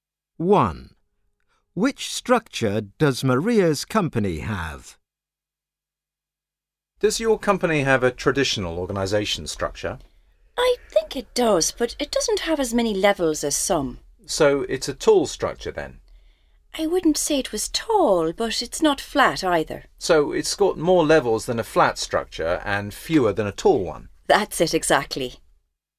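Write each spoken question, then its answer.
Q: Which structure does Maria's company have?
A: One with more levels than a flat structure but fewer than a tall one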